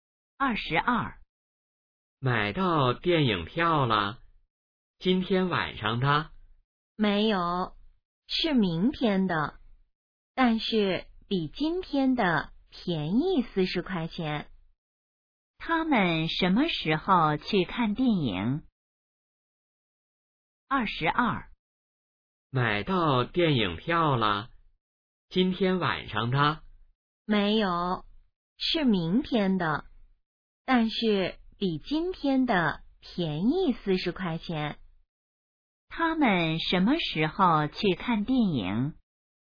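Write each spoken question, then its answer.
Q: 他们什么时候去看电影?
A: 明天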